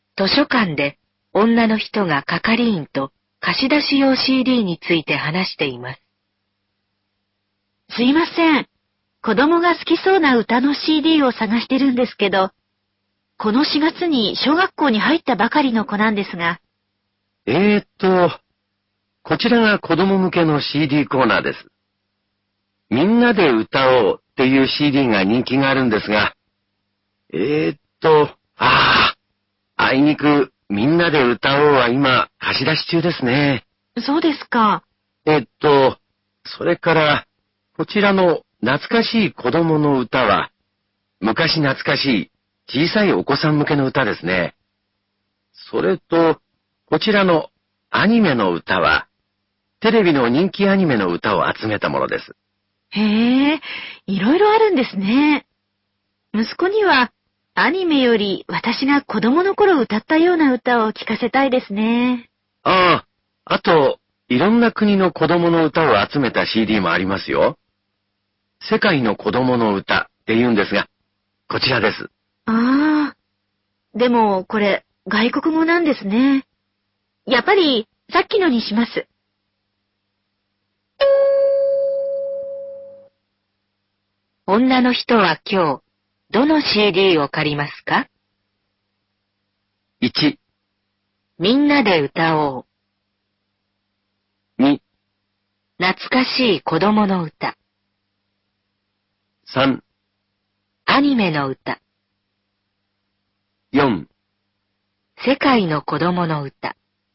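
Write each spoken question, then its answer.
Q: 女の人は今日、どの CD を借りますか?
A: 2: 懐かしい子供の歌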